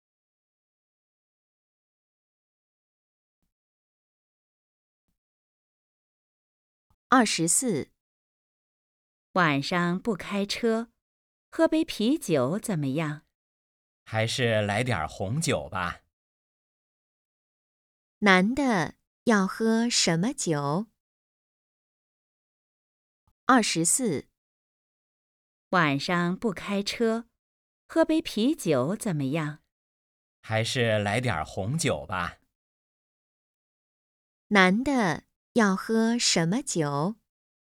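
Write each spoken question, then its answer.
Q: 男的要喝什么酒?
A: 红酒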